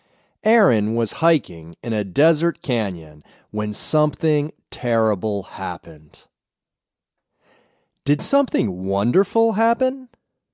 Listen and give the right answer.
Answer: No, something wonderful didn't happen.